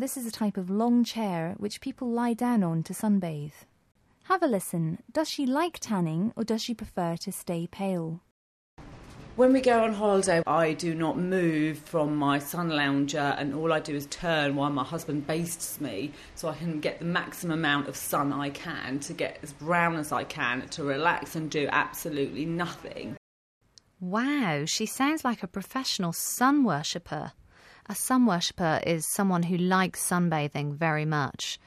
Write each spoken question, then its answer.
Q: Does she like tanning or does she prefer to stay pale?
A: Wow, she sounds like a professional sun worshipper.